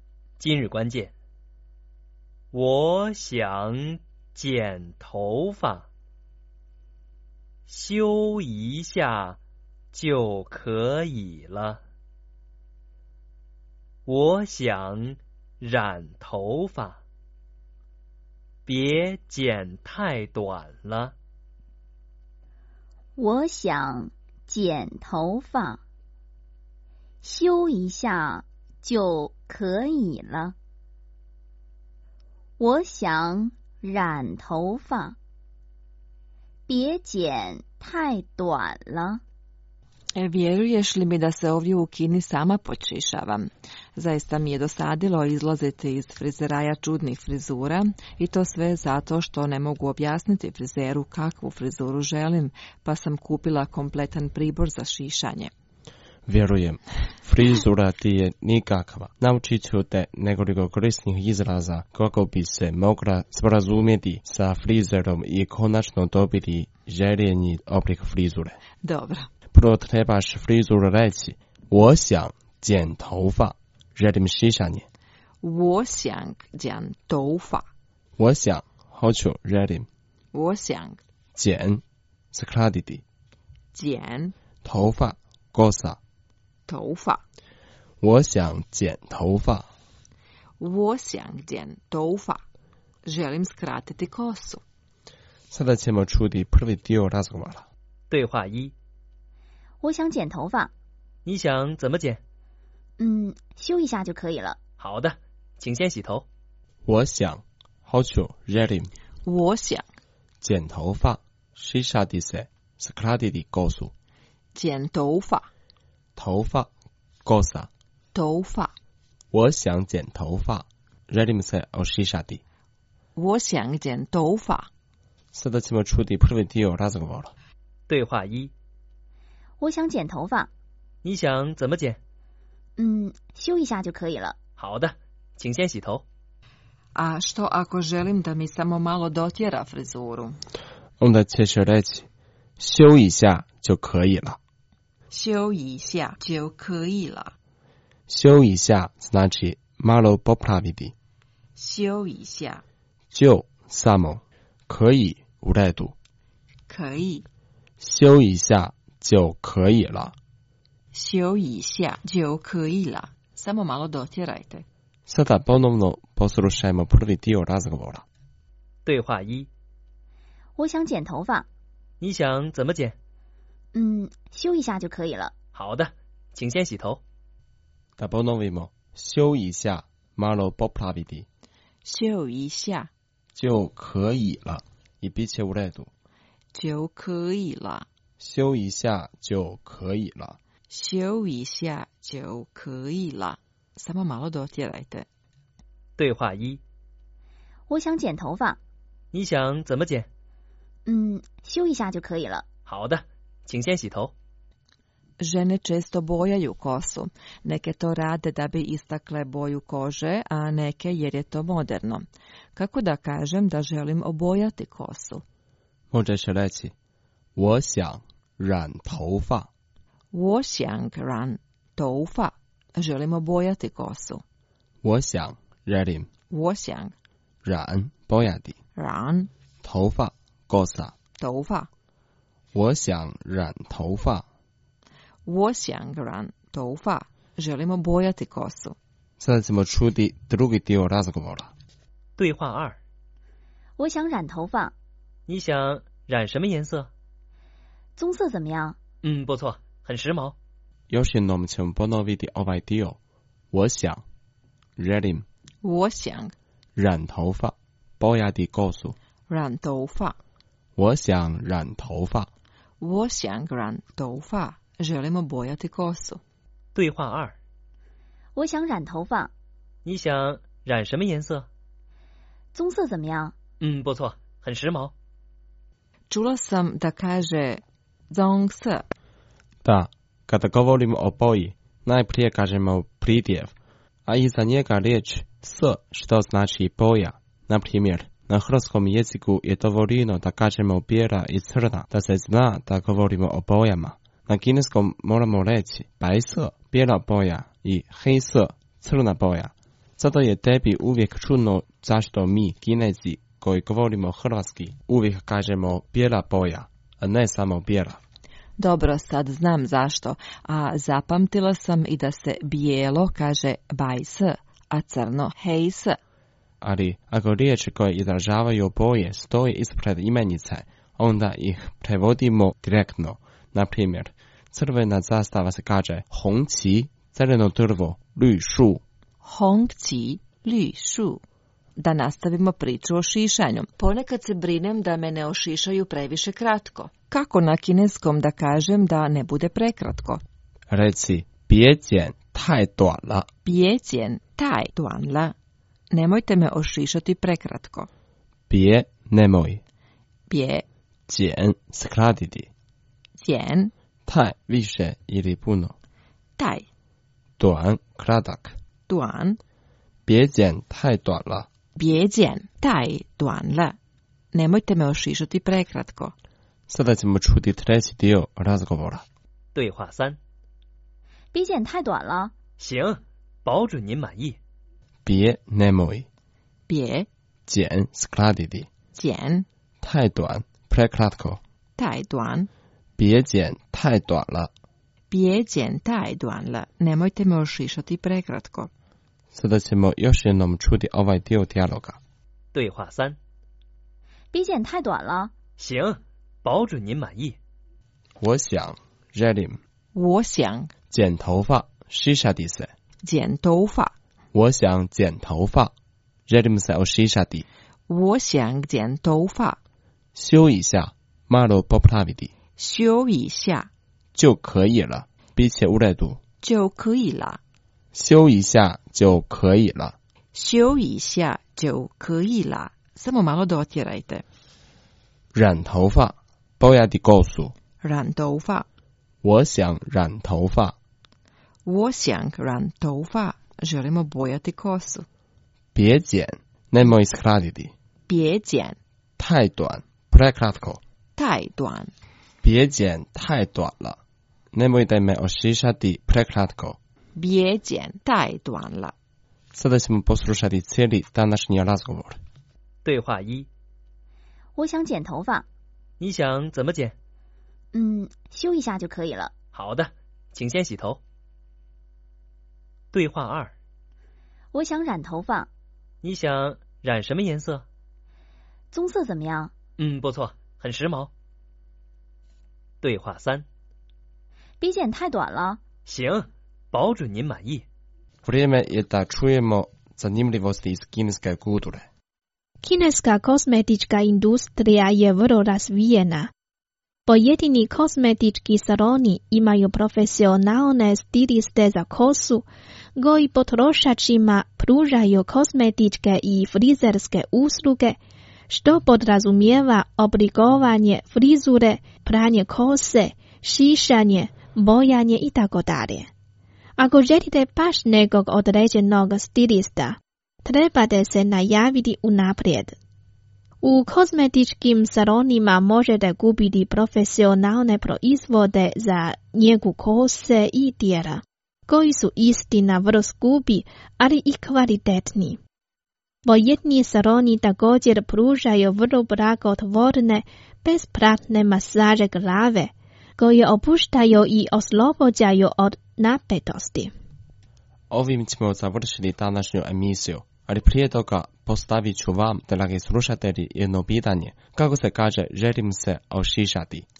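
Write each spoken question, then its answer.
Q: Kako se kaže, želim se ošišati?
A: 我想剪头发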